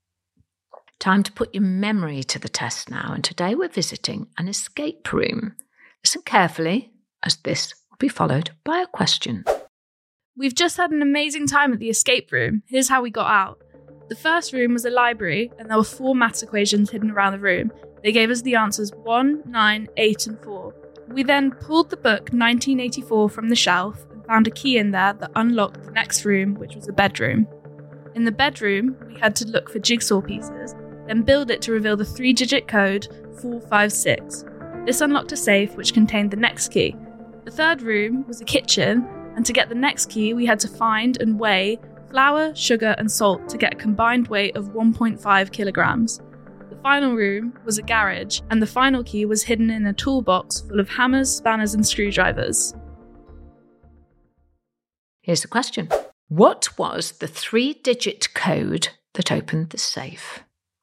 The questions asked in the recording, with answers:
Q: What was the three-digit code that opened the safe?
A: Well, it was 456.